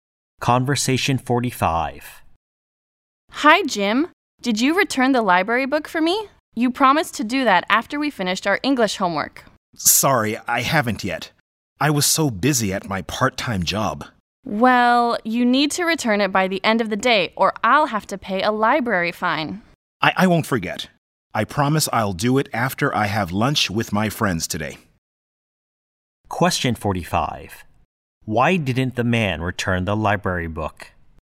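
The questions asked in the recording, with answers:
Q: Why didn't the man return the library book?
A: He was busy at his part-time job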